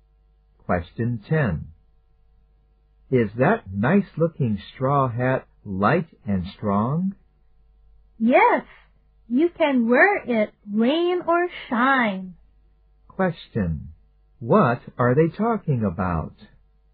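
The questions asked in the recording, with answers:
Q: What are they talking about?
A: A straw hat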